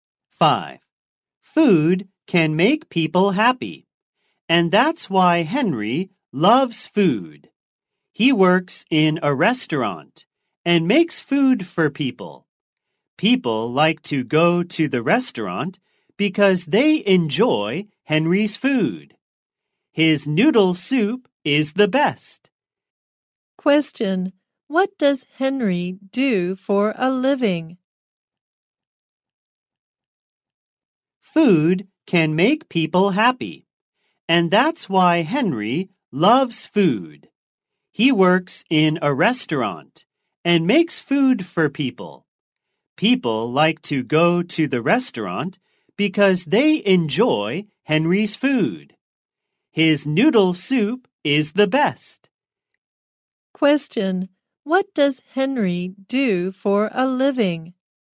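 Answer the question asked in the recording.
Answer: He is a cook in a restaurant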